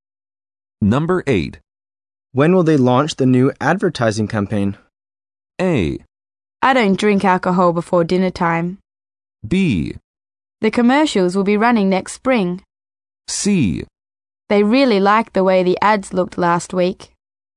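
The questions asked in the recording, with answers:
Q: When will they launch the new advertising campaign?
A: B: The commercials will be running next spring.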